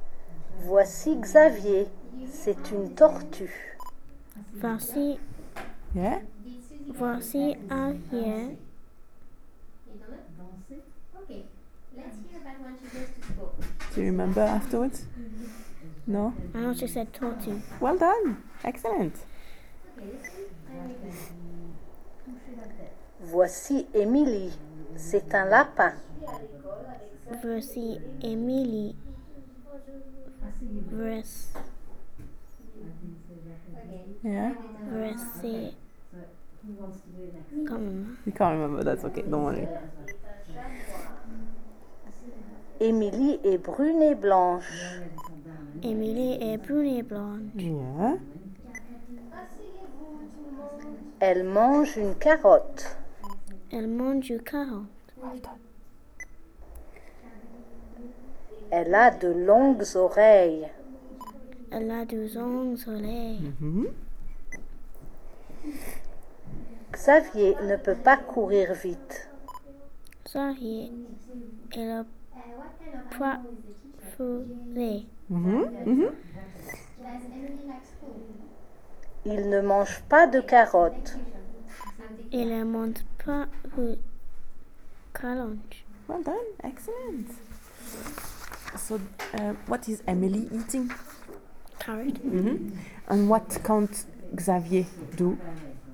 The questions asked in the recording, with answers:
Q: So, what is Emily eating?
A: Carrot.